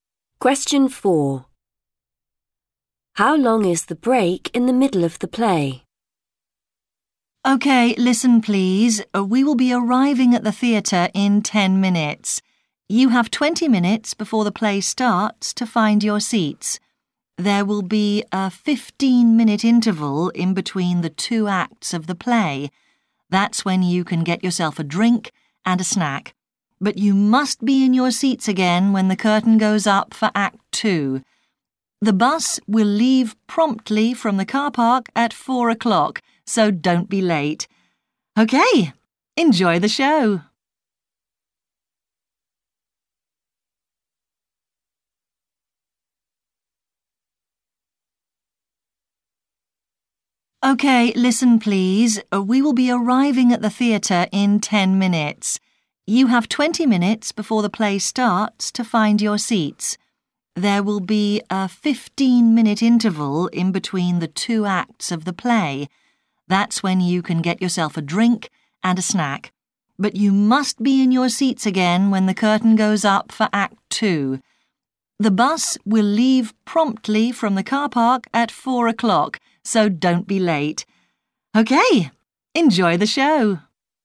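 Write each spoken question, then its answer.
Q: How long is the break in the middle of the play?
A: 15 minutes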